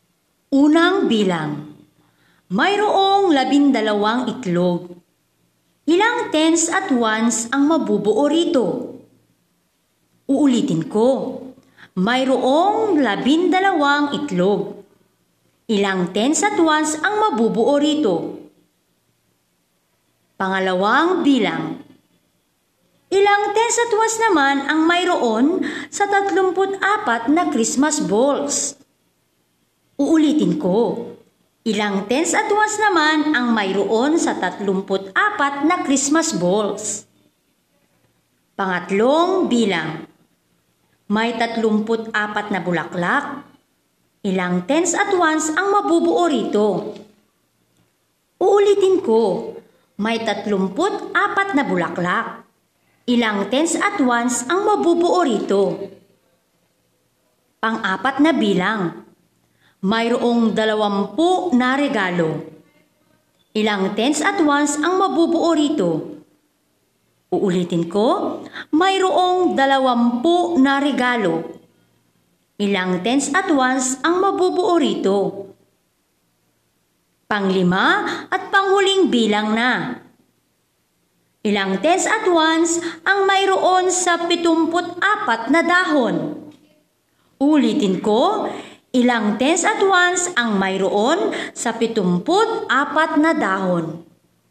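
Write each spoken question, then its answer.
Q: Ilang tens at ones ang mabubuo rito?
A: 1 tens at 2 ones

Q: ilang tens at ones naman ang mayroon sa 34 na Christmas balls?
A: 3 tens at 4 ones

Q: Ilang tens at ones ang mabubuo rito?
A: 3 tens at 4 ones

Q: Ilang tens at ones ang mabubuo rito?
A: 2 tens at 0 ones

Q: Ilang tens at ones ang mayroon sa 74 na dahon?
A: 7 tens at 4 ones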